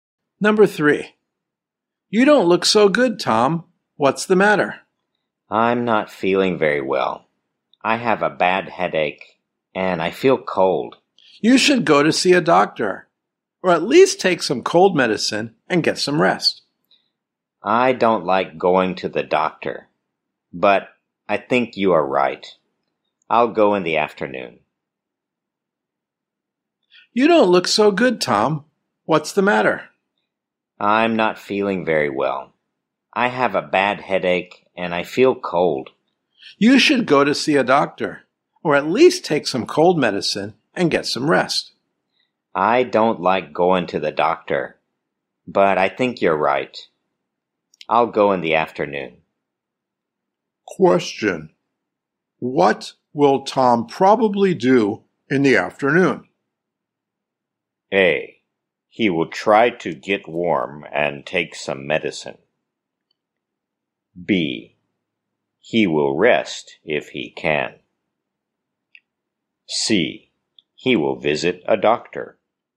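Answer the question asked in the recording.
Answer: C: He will visit a doctor.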